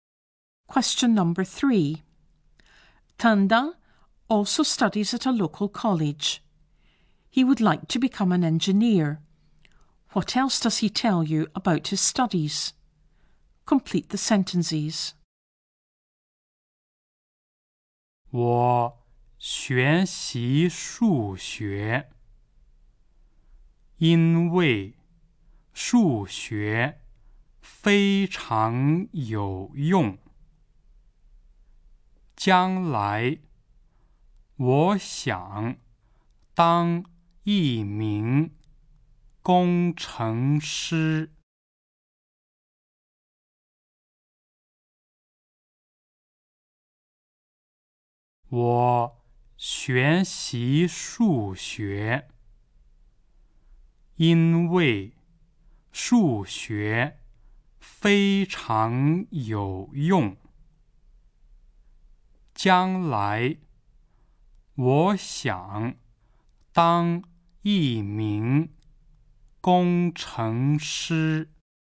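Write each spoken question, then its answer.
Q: What else does he tell you about his studies?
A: He studies maths because it is very useful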